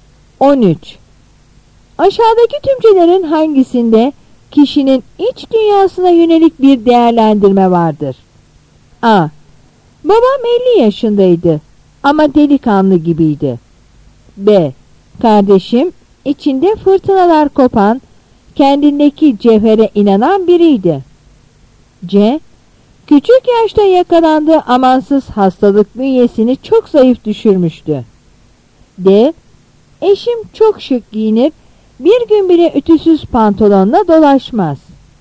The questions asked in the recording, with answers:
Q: Aşağıdaki tümcelerin hangisinde kişinin iç dünyasına yönelik bir değerlendirme vardır?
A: Yanıt B.